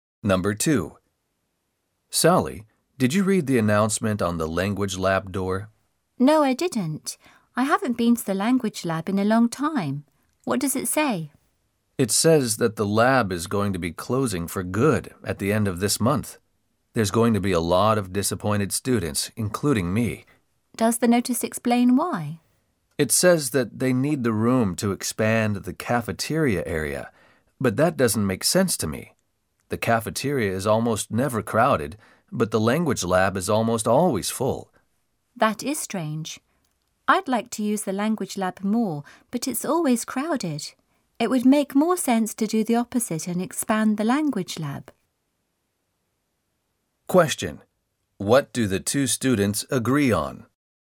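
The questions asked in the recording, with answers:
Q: What do the two students agree on?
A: Closing the language lab to expand the cafeteria makes no sense; the lab should be expanded instead.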